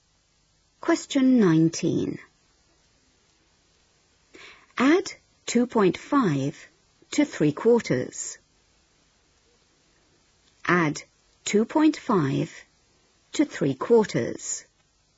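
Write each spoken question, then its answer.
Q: Add 2.5 to 3/4.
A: 3.25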